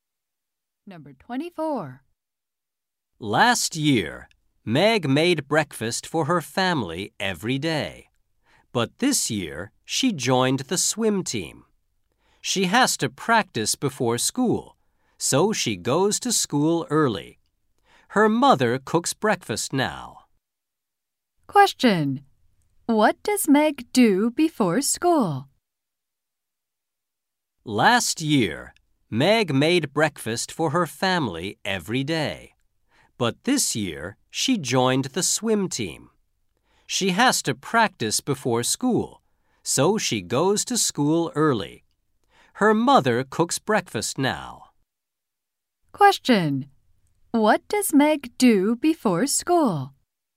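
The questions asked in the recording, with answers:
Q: What does Meg do before school?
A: Swim practice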